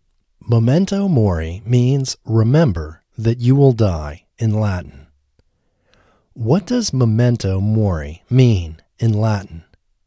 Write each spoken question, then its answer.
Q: What does memento mori mean in Latin?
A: It means remember that you will die in Latin.